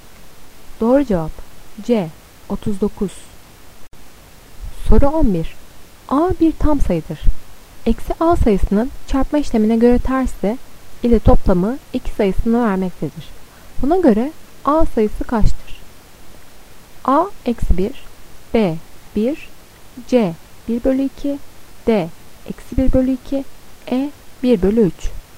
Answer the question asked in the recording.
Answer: Doğru cevap A eksi 1.